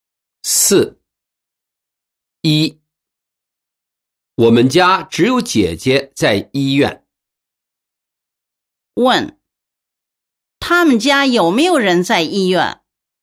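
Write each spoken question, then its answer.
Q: 他们家有没有人在医院?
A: 有,姐姐在医院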